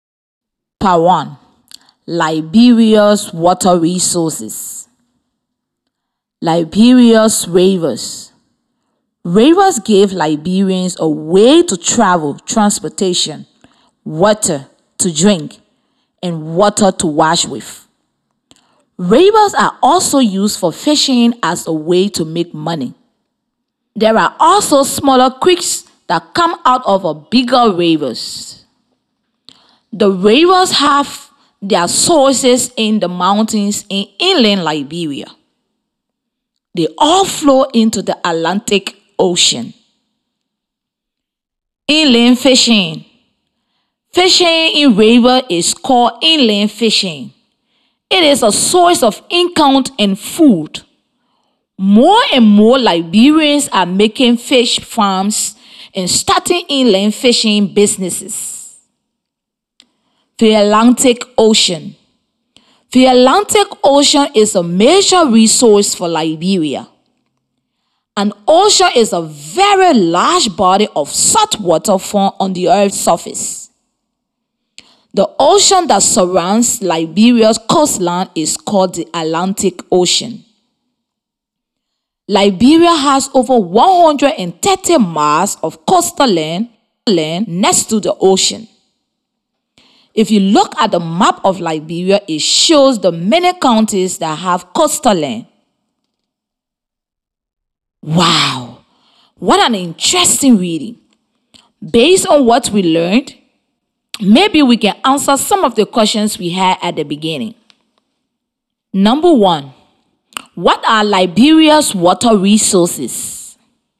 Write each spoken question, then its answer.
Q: what are Liberia's water resources?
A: Liberia's water resources are creeks, rivers, and oceans.